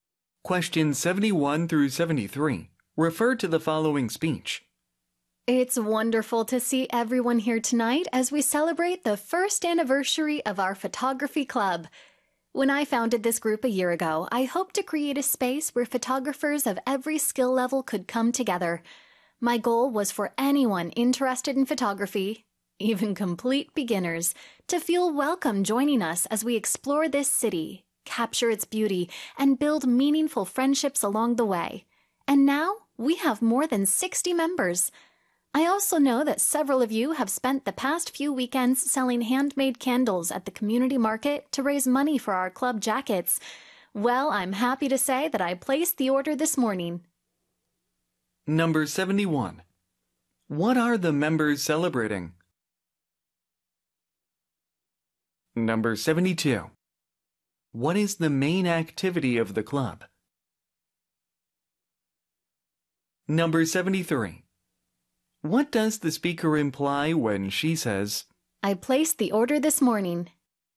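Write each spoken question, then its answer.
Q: What are the members celebrating?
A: The first anniversary of their photography club

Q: What is the main activity of the club?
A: Photography, exploring and photographing the city

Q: What does the speaker imply when she says,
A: The money raised was enough to order the club jackets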